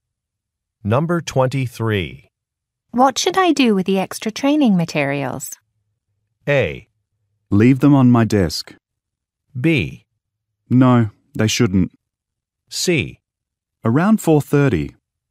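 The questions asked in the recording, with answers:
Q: What should I do with the extra training materials?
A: A: Leave them on my desk.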